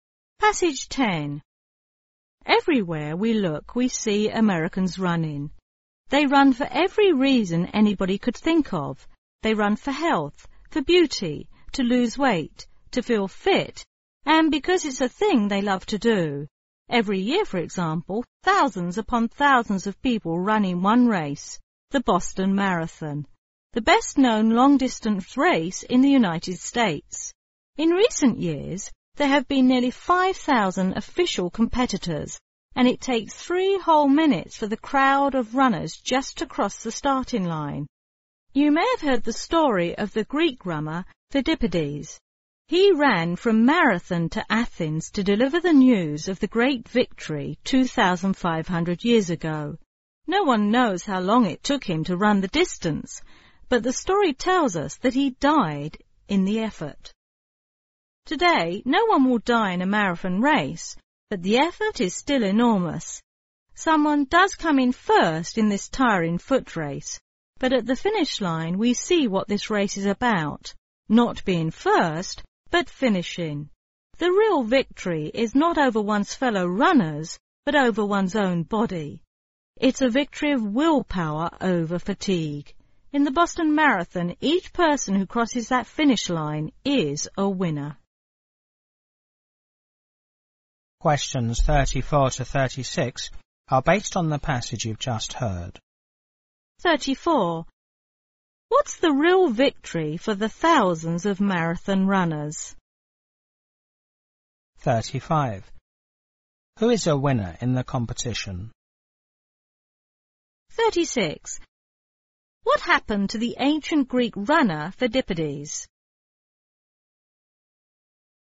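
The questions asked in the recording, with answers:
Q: What's the real victory for the thousands of marathon runners?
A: Victory over one's own body; willpower over fatigue

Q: Who is a winner in the competition?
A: Each person who crosses the finish line

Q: What happened to the ancient Greek runner Pheidippides?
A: He ran from Marathon to Athens with news of victory and died in the effort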